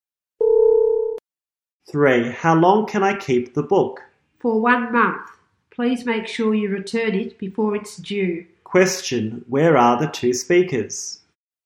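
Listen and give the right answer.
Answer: In a library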